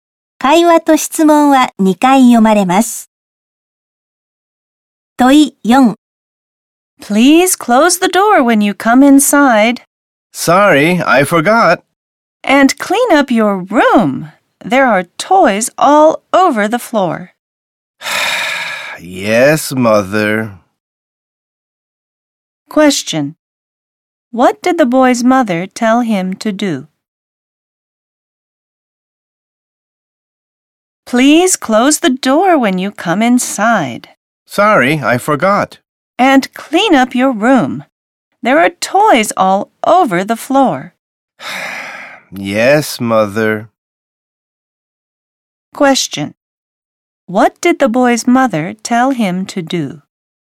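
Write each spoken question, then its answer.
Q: What did the boy's mother tell him to do?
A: To close the door and clean up his room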